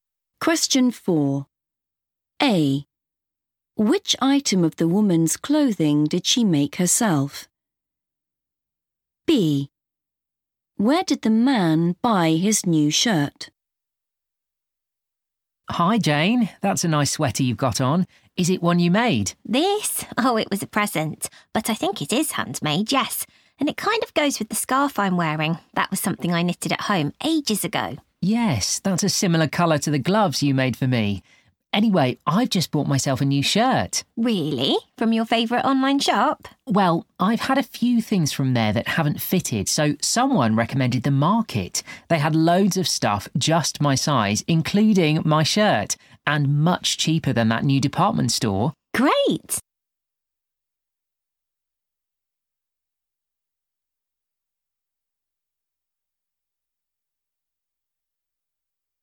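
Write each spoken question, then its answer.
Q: Which item of the woman's clothing did she make herself?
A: the scarf

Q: Where did the man buy his new shirt?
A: The Market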